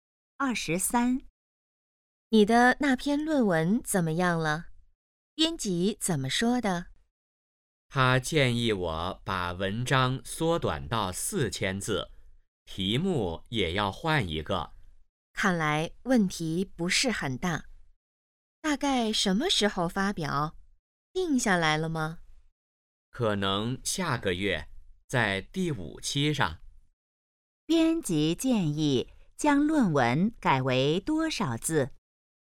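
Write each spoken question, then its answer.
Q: 编辑建议将论文改为多少字?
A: 4000字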